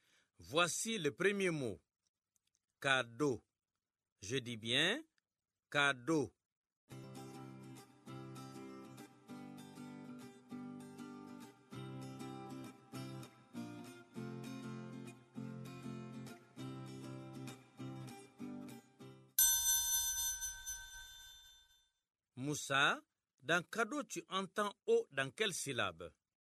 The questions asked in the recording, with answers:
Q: Moussa, dans cadeau, tu entends O dans quelle syllabe?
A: Monsieur, dans Do, la deuxième syllabe.